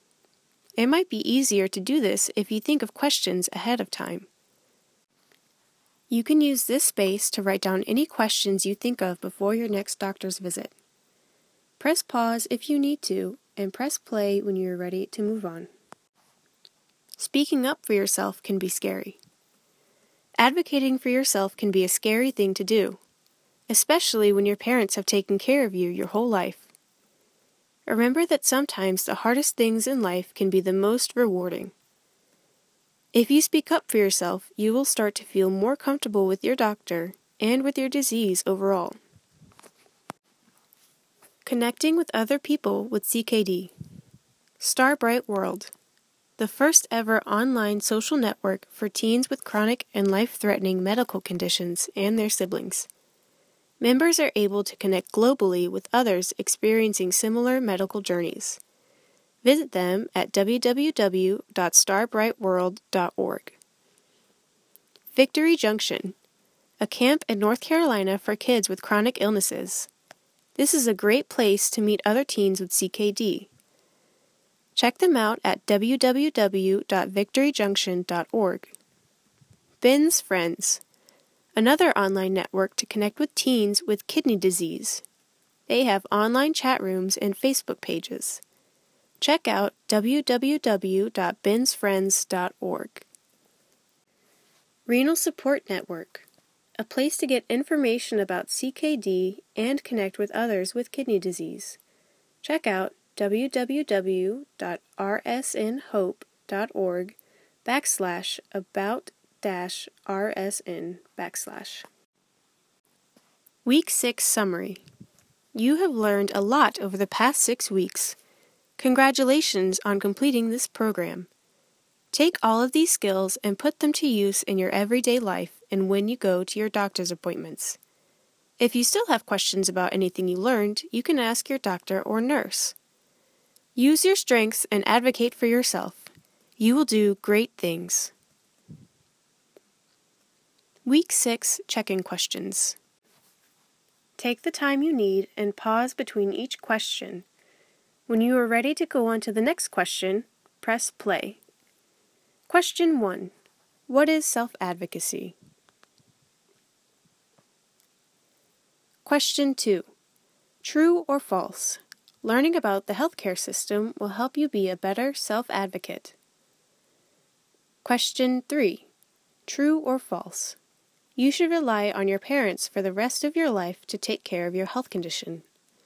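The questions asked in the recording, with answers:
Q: True or false? You should rely on your parents for the rest of your life to take care of your health condition.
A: False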